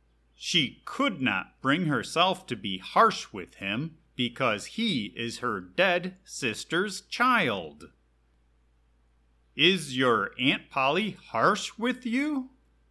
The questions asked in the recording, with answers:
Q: Is your Aunt Polly harsh with you?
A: No, my Aunt Polly cannot bring herself to be harsh with me because I am her dead sister's child.